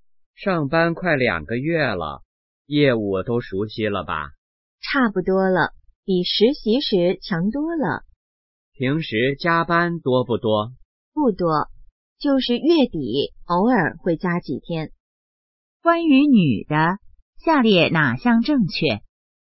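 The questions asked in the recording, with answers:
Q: 关于女的,下列哪项正确?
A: 业务基本熟悉了,平时加班不多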